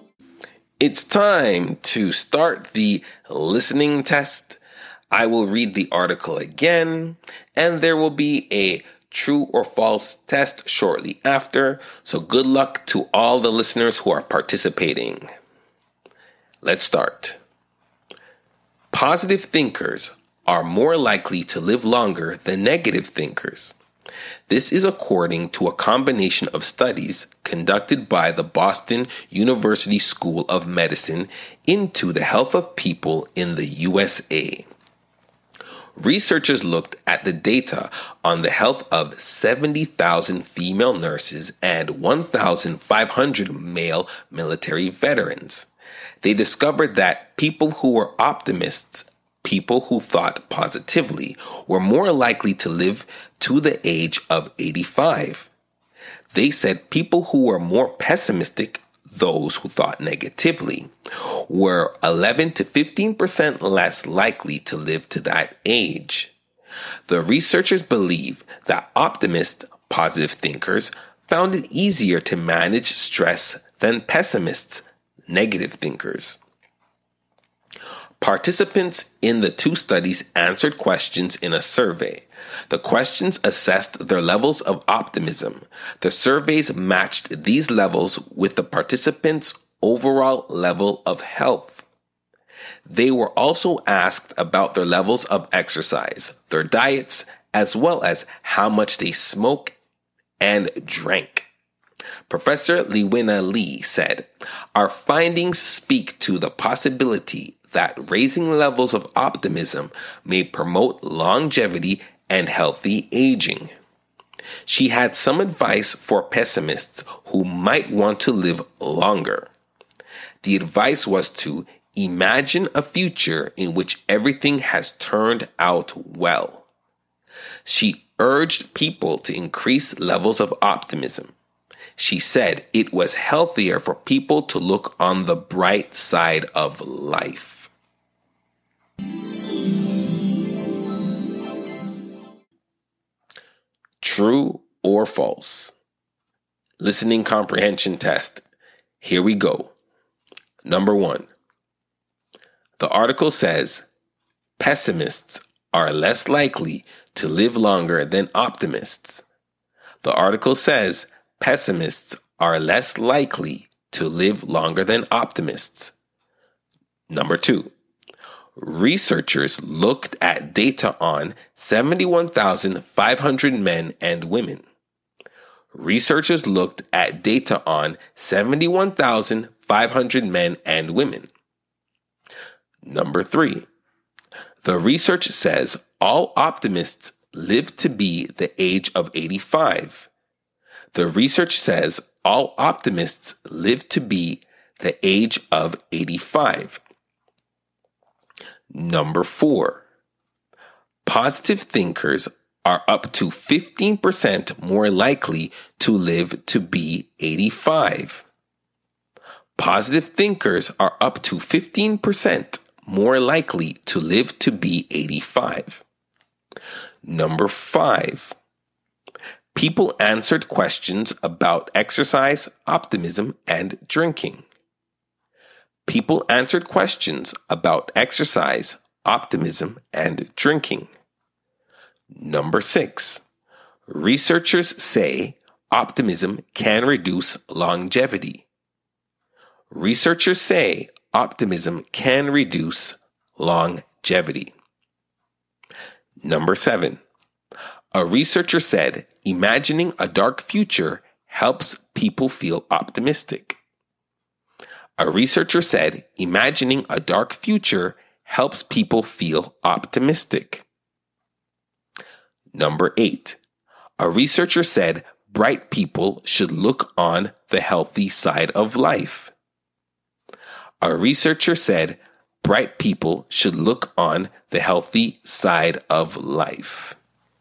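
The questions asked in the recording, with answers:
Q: The article says pessimists are less likely to live longer than optimists.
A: True

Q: Researchers looked at data on 71,500 men and women.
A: True

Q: The research says all optimists live to be the age of 85.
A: False

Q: People answered questions about exercise, optimism, and drinking.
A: True

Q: Researchers say optimism can reduce longevity.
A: False

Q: A researcher said imagining a dark future helps people feel optimistic.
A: False

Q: A researcher said bright people should look on the healthy side of life.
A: False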